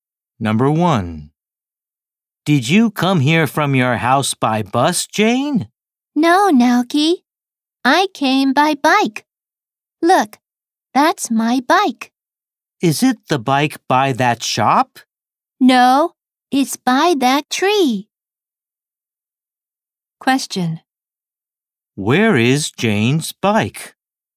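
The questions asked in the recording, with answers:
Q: Where is Jane's bike?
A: By that tree.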